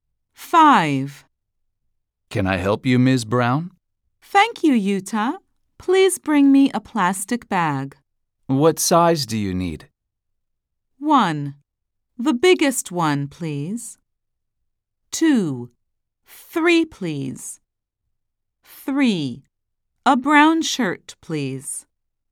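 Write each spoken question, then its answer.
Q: What size do you need?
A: 1: The biggest one, please.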